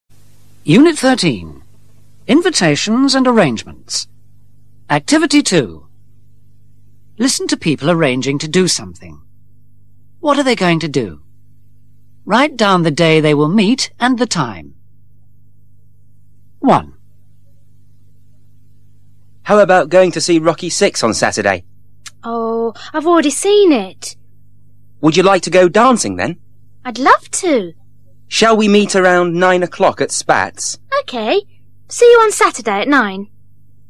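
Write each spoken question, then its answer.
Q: What are they going to do?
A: Go dancing at Spats on Saturday at 9 o'clock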